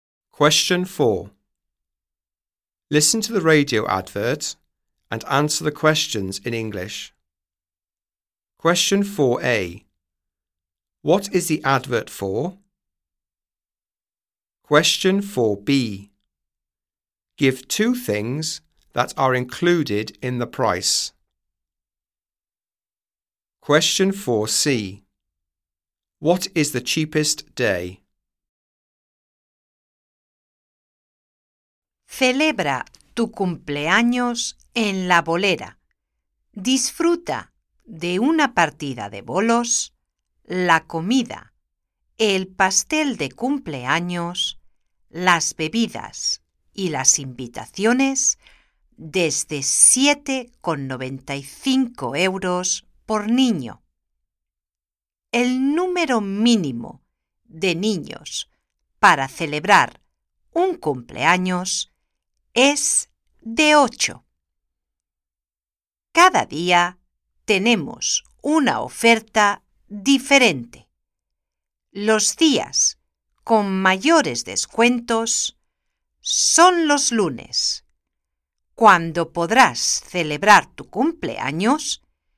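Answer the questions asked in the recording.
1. Birthday parties at a bowling alley
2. Game of bowling, food, birthday cake, drinks, invitations
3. Monday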